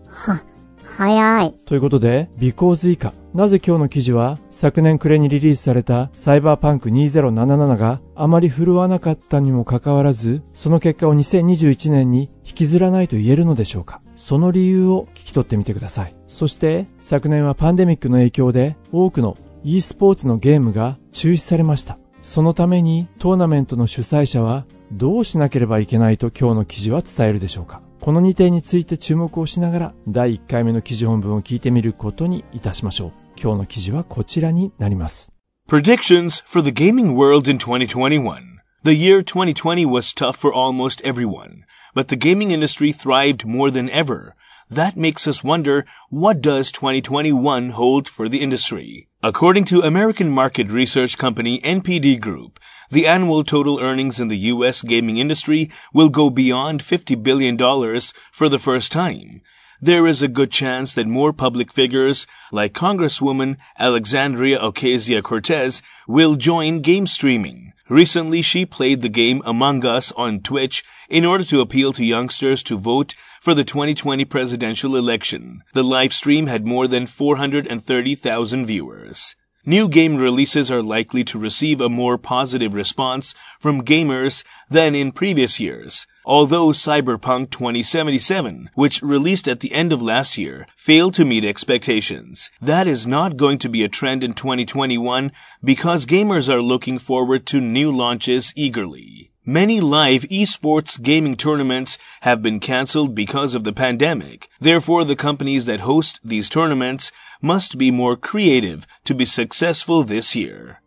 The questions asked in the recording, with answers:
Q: なぜ今日の記事は昨年暮れにリリースされたサイバーパンク2077があまり振るわなかったにもかかわらずその結果を2021年に引きずらないと言えるのでしょうか。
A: That is not going to be a trend in 2021 because gamers are looking forward to new launches eagerly.